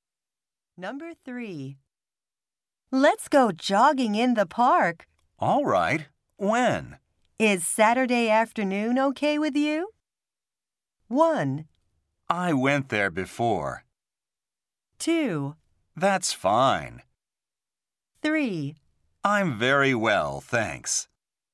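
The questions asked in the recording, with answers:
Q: Is Saturday afternoon okay with you?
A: 2: That's fine.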